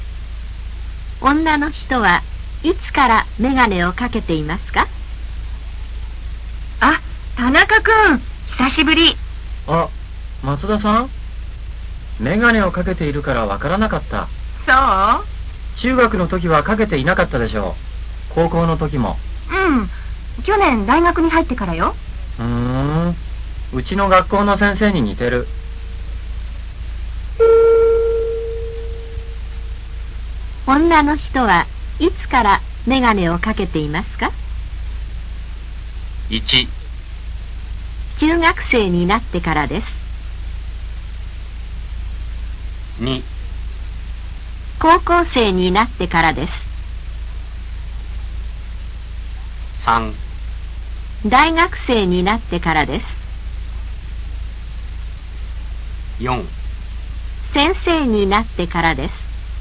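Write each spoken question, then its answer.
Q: 女の人はいつからメガネをかけていますか?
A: 3: 大学生になってからです。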